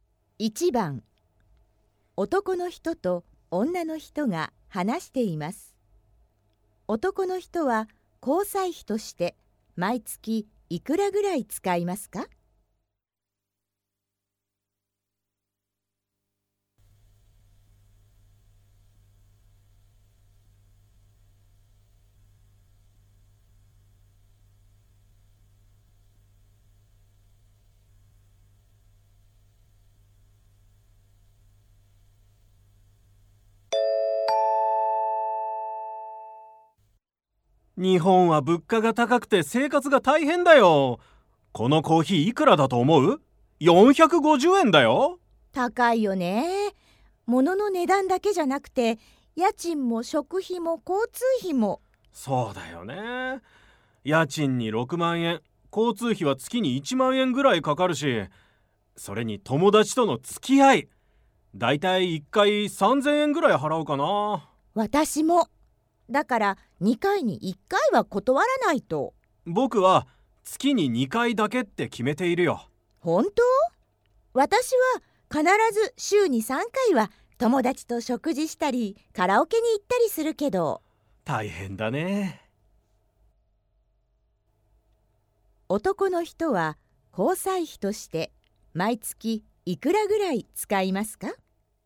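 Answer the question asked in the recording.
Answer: 6000円ぐらい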